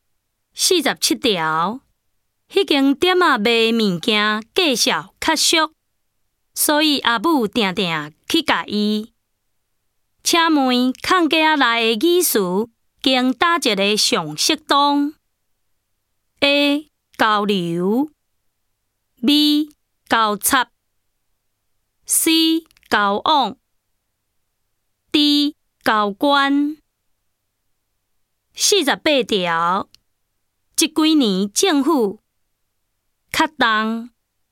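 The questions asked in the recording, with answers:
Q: 请问空格内的语词经哪一个上适当 ?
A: D: 交关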